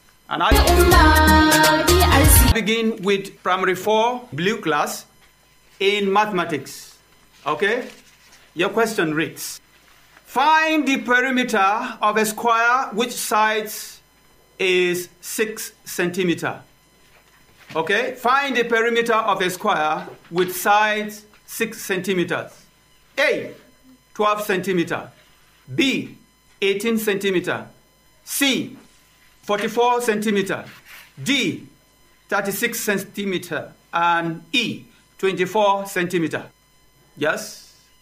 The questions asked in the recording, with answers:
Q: find the perimeter of a square which sides is 6 centimeter.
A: Yes, it's 24 centimeters.